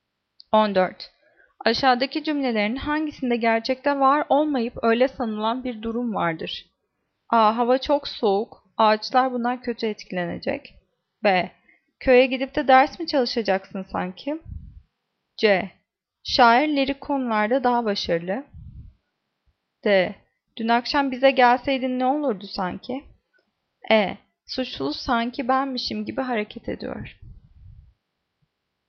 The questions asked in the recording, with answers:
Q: Aşağıdaki cümlelerin hangisinde gerçekte var olmayıp öyle sanılan bir durum vardır?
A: Cevap E. Suçlu sanki benmişim gibi hareket ediyor.